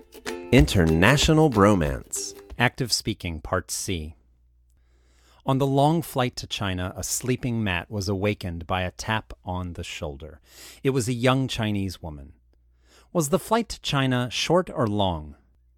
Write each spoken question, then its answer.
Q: Was the flight to China short or long?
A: It was a long flight.